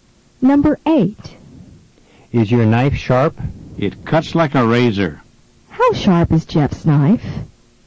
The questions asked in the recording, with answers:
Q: How sharp is Jeff's knife?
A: It's as sharp as a razor.